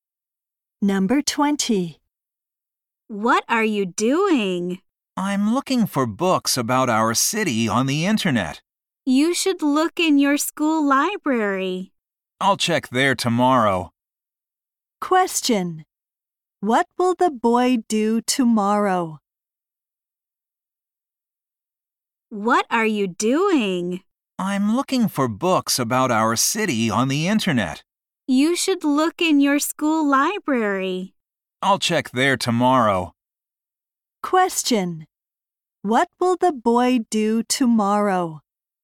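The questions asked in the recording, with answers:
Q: What will the boy do tomorrow?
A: Look for books in his school library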